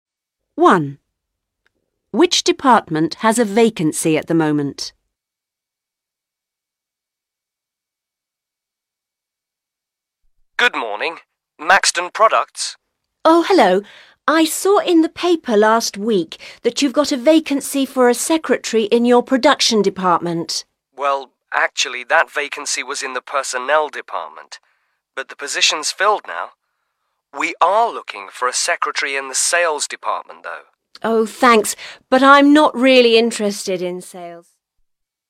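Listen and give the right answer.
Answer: The sales department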